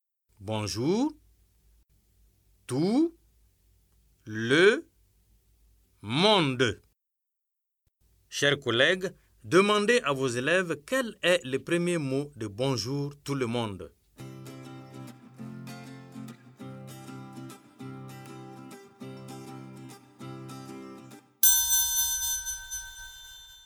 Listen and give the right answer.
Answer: J'espère que vos élèves ont dit bonjour.